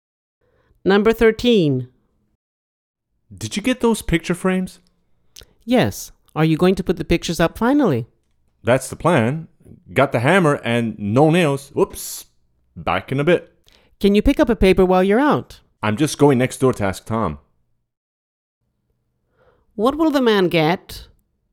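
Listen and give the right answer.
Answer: Nails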